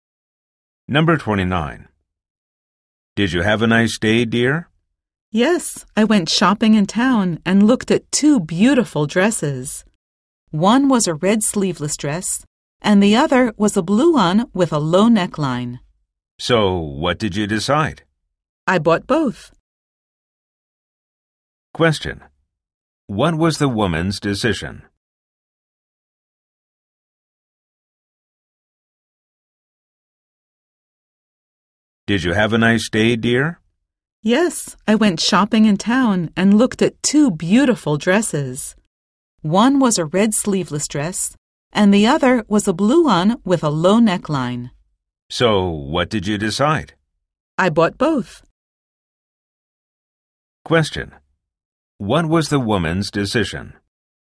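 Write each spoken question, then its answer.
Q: What was the woman's decision?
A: She bought both dresses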